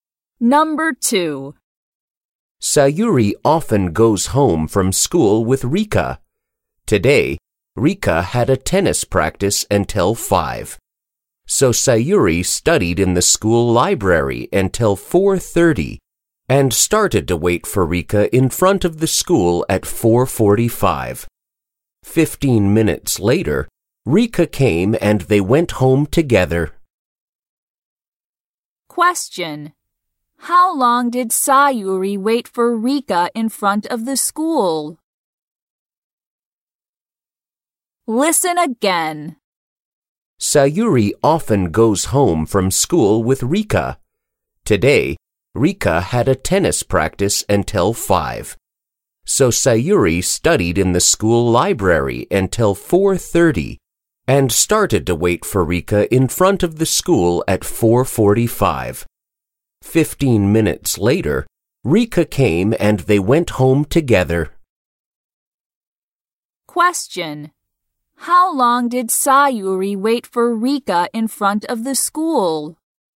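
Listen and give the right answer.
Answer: For 15 minutes.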